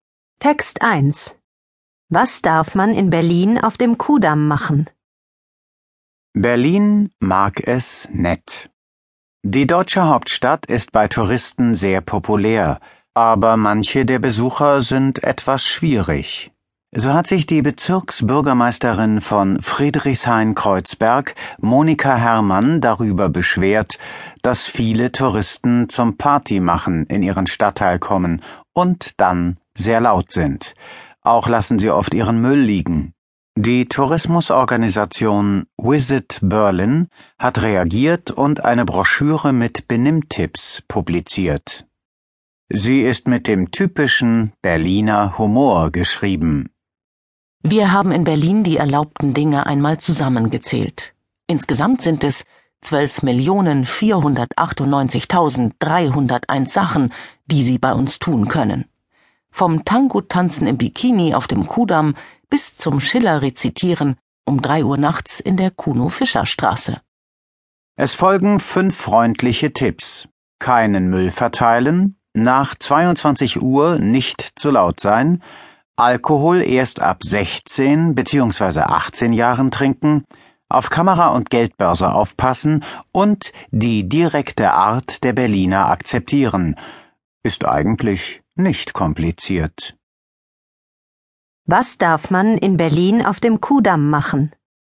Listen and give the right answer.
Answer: Man darf im Bikini Tango tanzen.